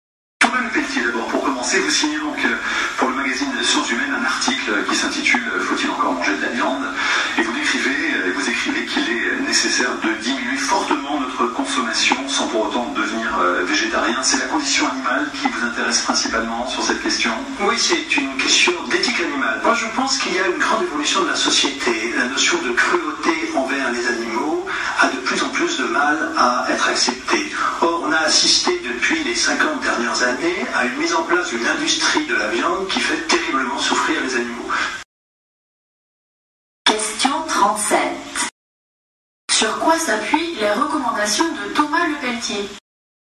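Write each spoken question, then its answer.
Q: Sur quoi s'appuient les recommandations de Thomas Le Peltier ?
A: Sur l'éthique animale : la souffrance des animaux dans l'industrie de la viande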